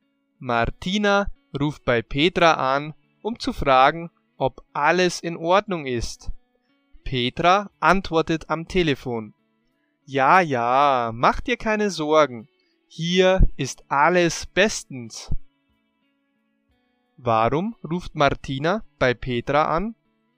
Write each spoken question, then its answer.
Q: Warum ruft Martina bei Petra an?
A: Sie ruft an, um zu fragen, ob alles in Ordnung ist.